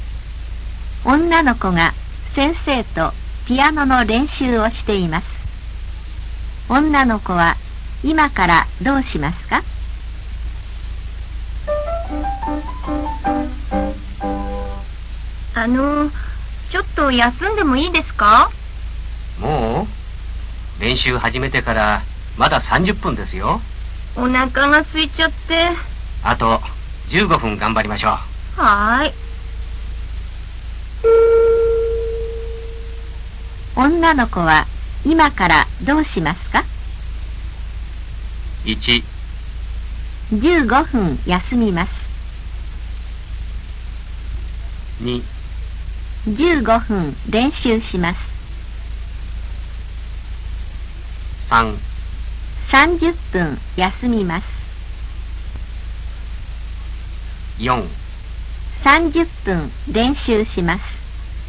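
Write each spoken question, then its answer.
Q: 女の子は今からどうしますか?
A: 2: 15分練習します。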